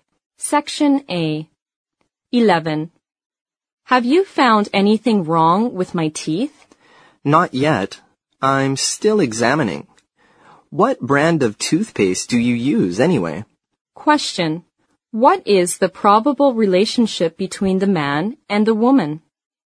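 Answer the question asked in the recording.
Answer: Dentist and patient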